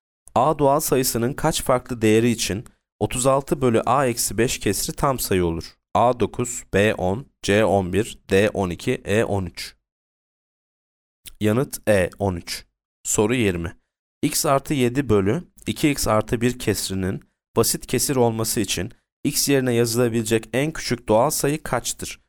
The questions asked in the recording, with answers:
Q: A doğal sayısının kaç farklı değeri için 36 bölü A eksi 5 kesri tam sayı olur?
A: Yanıt E 13.